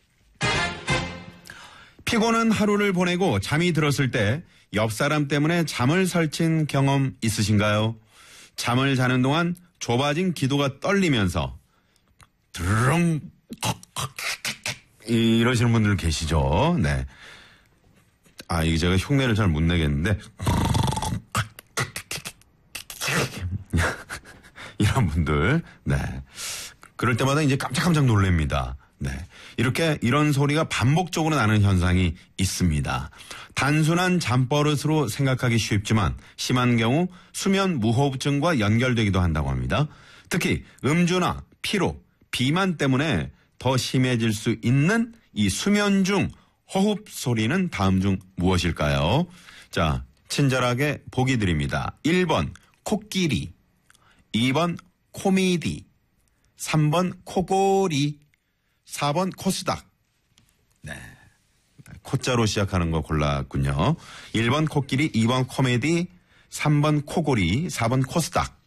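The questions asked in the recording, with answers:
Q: 특히 음주나 피로, 비만 때문에 더 심해질 수 있는 이 수면 중 호흡 소리는 다음 중 무엇일까요?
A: 3: 코골이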